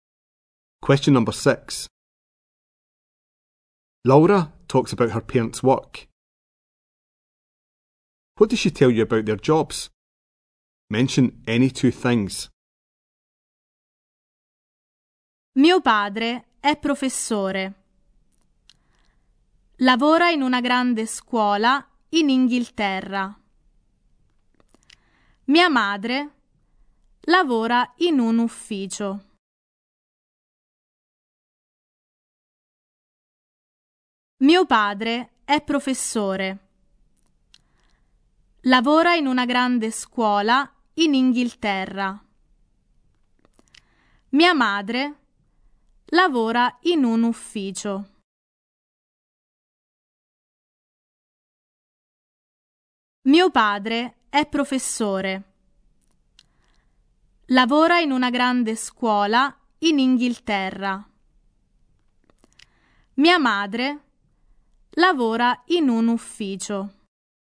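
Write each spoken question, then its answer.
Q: What does she tell you about their jobs?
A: Father is a teacher in a big school in England; mother works in an office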